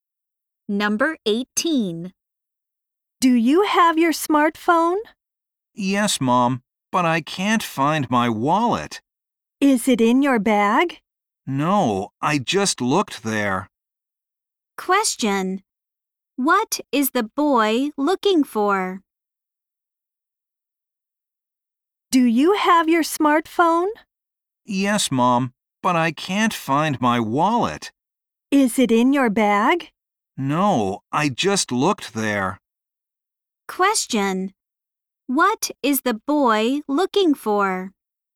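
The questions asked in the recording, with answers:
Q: What is the boy looking for?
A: His wallet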